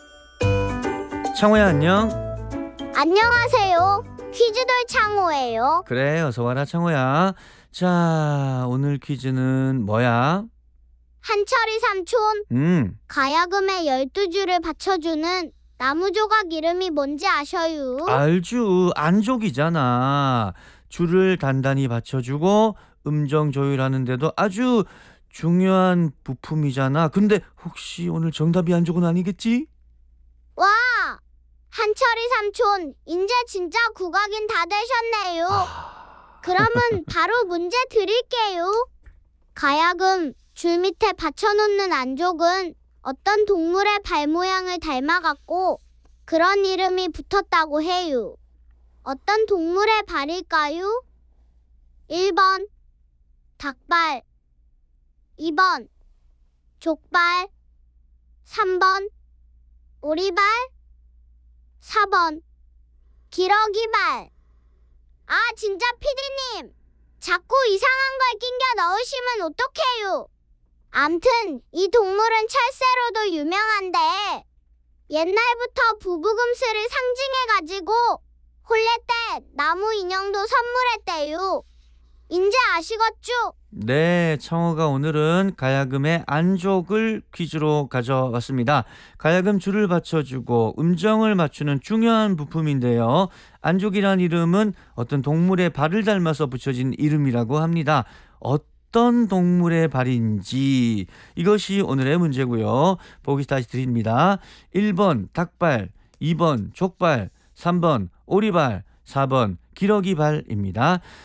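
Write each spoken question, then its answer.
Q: 어떤 동물의 발일까요? 1번 닭발, 2번 족발, 3번 오리발, 4번 기러기발.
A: 4: 기러기발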